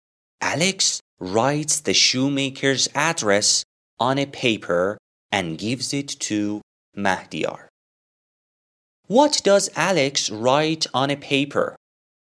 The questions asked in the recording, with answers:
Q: What does Alex write on a paper?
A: Alex writes the shoemaker's address on a paper and gives it to Mahdiyar.